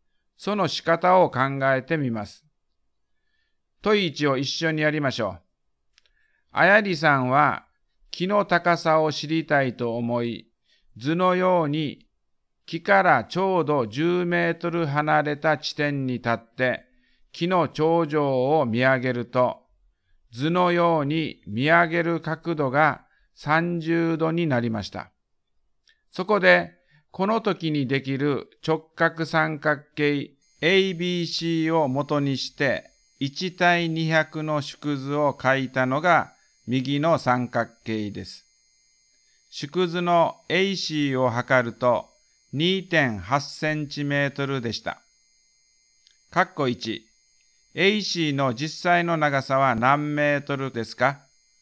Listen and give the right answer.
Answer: 560センチメートルになったと思います。